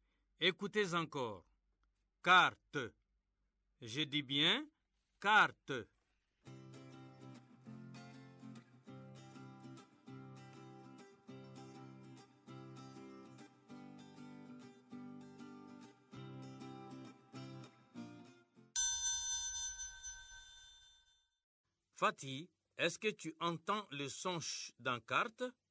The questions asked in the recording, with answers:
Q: Fatih, est-ce que tu entends le son ch dans carte?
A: Non, monsieur. Dans carte, il n'y a pas le son ch.